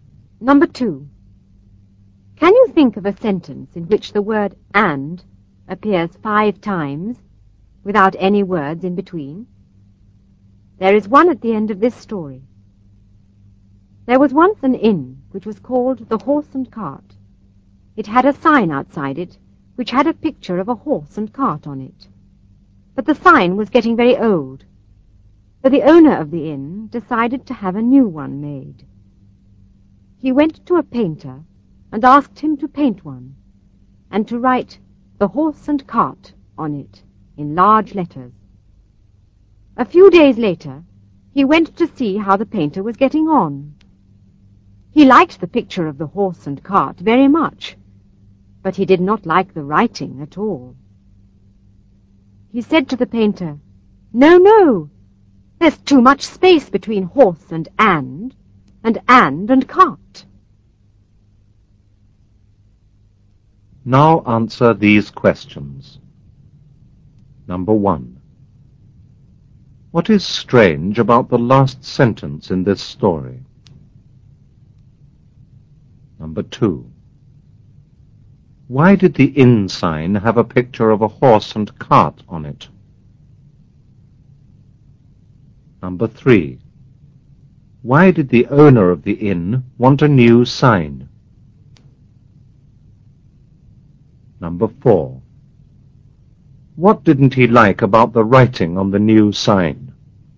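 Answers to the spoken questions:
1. The word 'and' appears five times in a row
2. Because the inn was called the Horse and Cart
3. The old sign was getting very old
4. There was too much space between 'horse' and 'and' and 'and' and 'cart'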